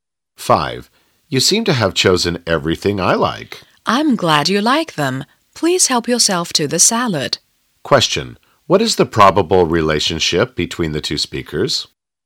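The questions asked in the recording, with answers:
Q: What is the probable relationship between the two speakers?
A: Host and guest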